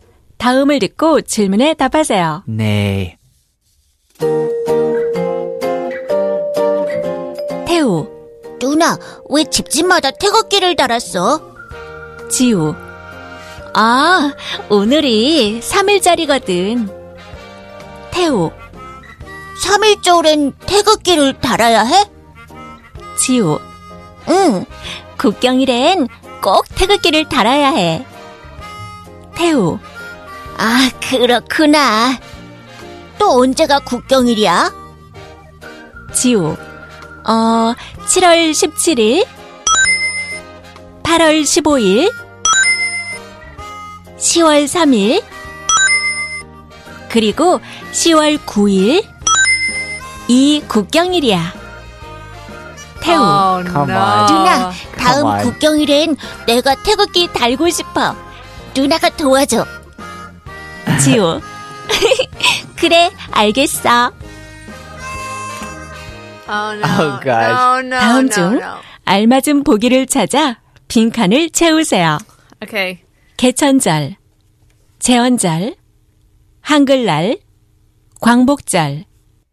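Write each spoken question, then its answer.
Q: 다음 중 알맞은 보기를 찾아 빈칸을 채우세요.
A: 7월 17일: 제헌절, 8월 15일: 광복절, 10월 3일: 개천절, 10월 9일: 한글날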